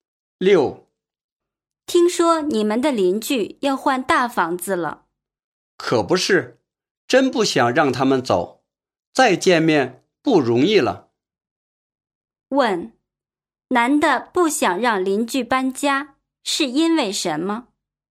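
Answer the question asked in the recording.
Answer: 以后再见面不容易了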